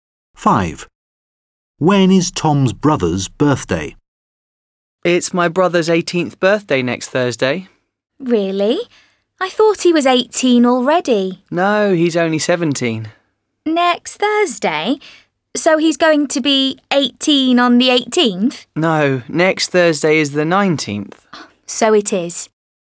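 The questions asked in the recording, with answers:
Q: When is Tom's brother's birthday?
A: Next Thursday, the 19th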